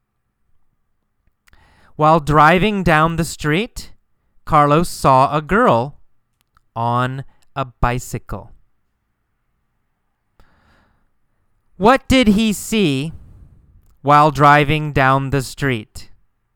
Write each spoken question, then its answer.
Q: What did he see while driving down the street?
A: He saw a girl on a bicycle while driving down the street.